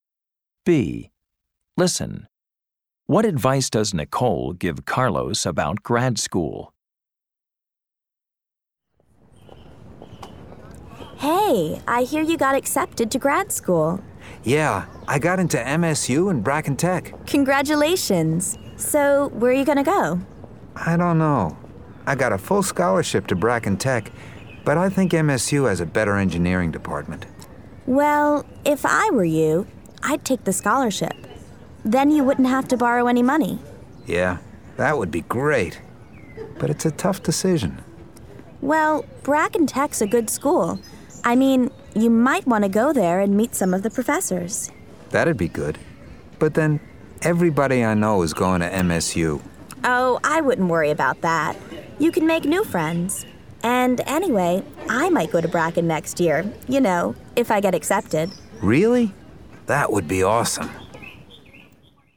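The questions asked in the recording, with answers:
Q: What advice does Nicole give Carlos about grad school?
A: Take the scholarship to Bracken Tech, visit and meet the professors, and don't worry about friends because he can make new ones.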